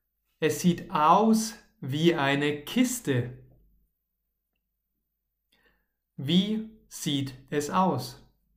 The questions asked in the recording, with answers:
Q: Wie sieht es aus?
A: Wie eine Kiste. Es sieht aus wie eine Kiste.